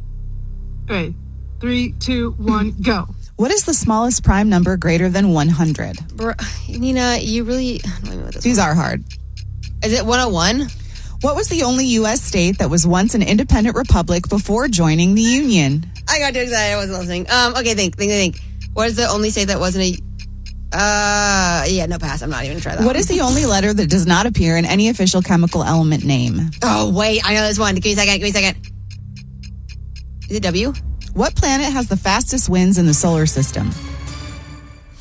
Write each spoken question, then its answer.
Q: What is the smallest prime number greater than 100?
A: The smallest prime number greater than 100 is 101.